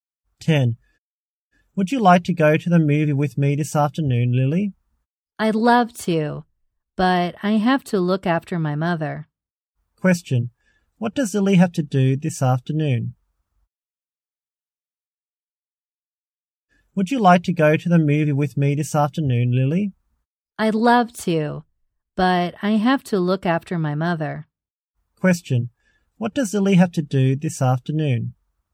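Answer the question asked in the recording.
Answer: Look after her mother.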